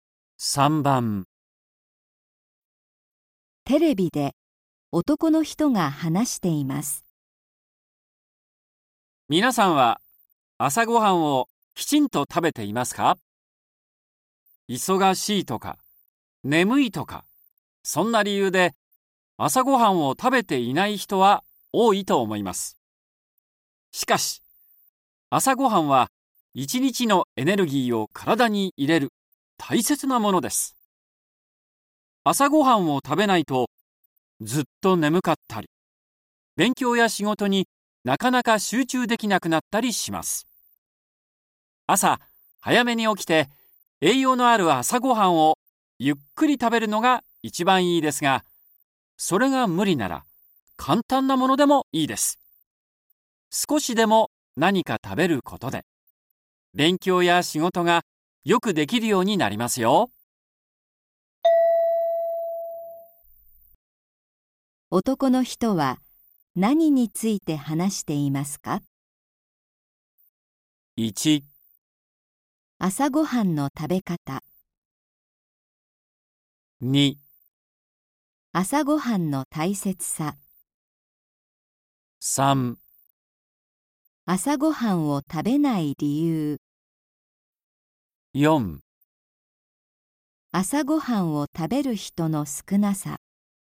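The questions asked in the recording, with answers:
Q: 男の人は何について話していますか?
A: 2: 朝ごはんの大切さ。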